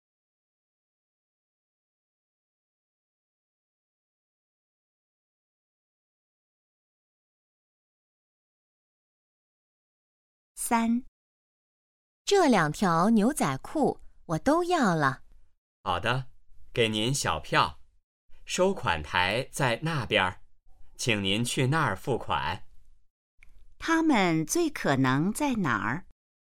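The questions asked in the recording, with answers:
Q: 他们最可能在哪儿?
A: 商店(服装店)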